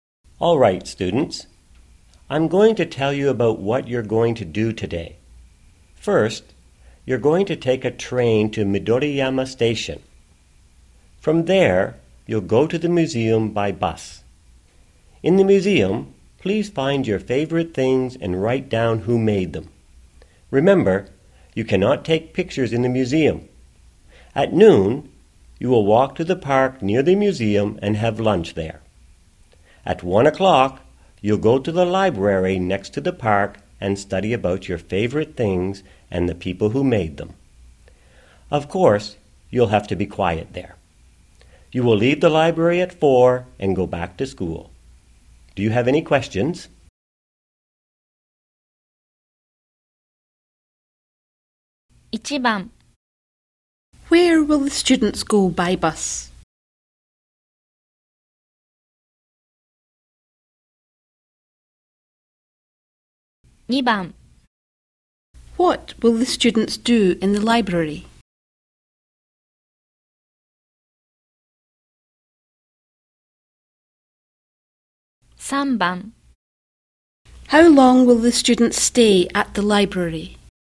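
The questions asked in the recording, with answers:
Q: Where will the students go by bus?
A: To the museum.

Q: What will the students do in the library?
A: Study about their favorite things and the people who made them.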